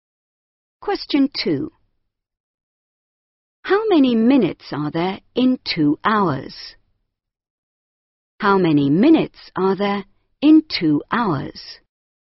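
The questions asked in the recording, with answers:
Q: How many minutes are there in 2 hours?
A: 120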